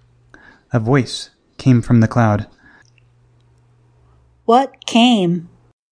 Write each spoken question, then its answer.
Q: What came?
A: A voice came.